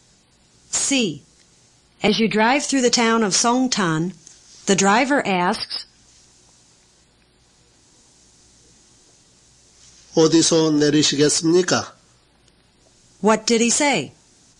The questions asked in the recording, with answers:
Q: What did he say?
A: He said, where would you like to get off?